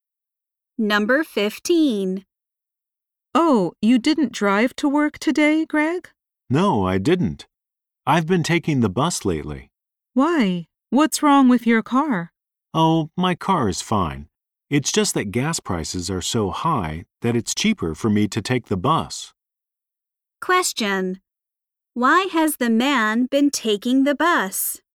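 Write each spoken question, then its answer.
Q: Why has the man been taking the bus?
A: It's cheaper because gas prices are high.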